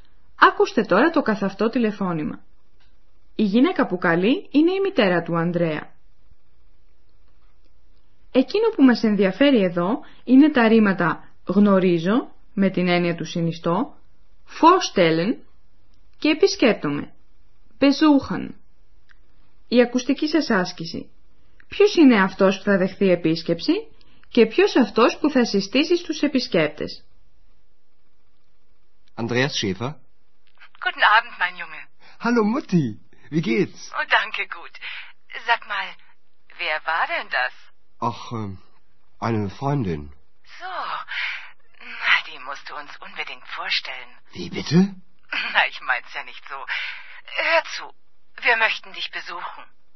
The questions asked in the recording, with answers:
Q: Ποιος είναι αυτός που θα δεχθεί επίσκεψη και ποιος αυτός που θα συστήσει στους επισκέπτες?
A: Η μητέρα του Ανδρέα θέλει να τον επισκεφθεί και να τις γνωρίσει ο Ανδρέας την Εξ.